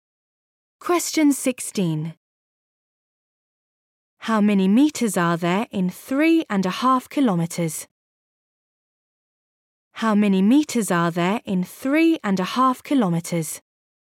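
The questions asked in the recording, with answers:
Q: How many metres are there in 3.5 kilometres?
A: 3500 metres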